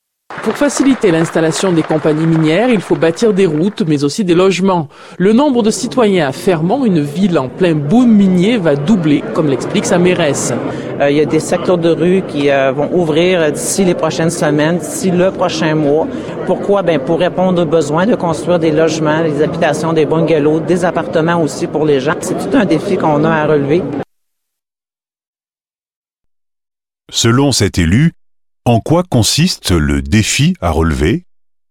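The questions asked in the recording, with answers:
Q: Selon cet élu, en quoi consiste le défi à relever?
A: Construire des logements (habitations, bungalows, appartements) pour une population qui va doubler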